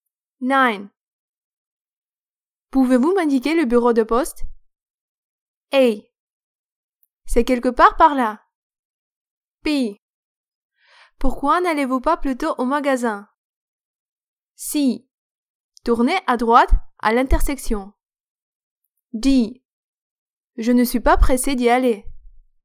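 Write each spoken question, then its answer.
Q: Pouvez-vous m'indiquer le bureau de poste?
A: C: Tournez à droite à l'intersection.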